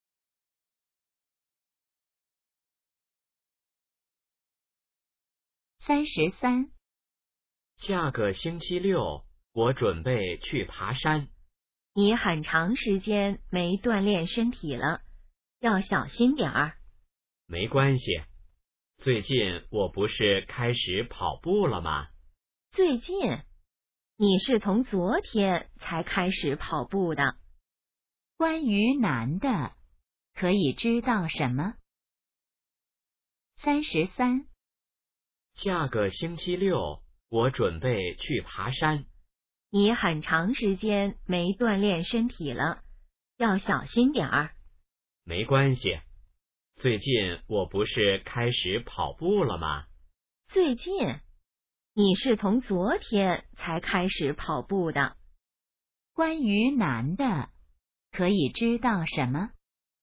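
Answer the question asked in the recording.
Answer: 昨天才开始跑步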